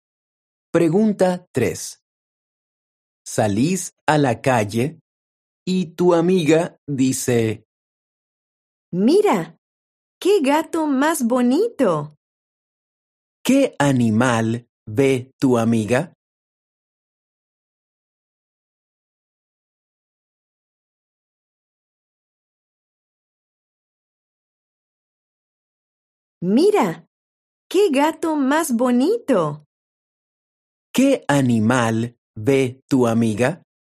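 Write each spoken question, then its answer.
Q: ¿Qué animal ve tu amiga?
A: un gato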